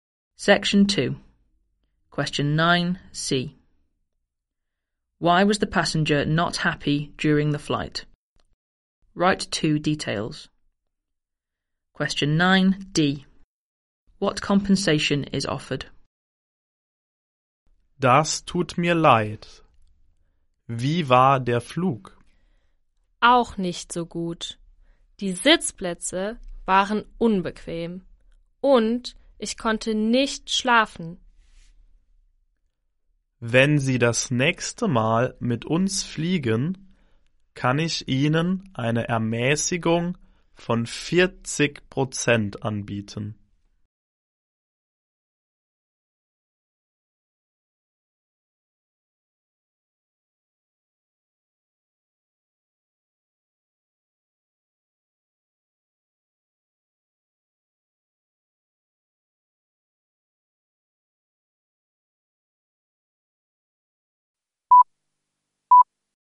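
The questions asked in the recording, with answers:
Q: Why was the passenger not happy during the flight?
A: The seats were uncomfortable and they couldn't sleep

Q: What compensation is offered?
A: 40% discount on the next flight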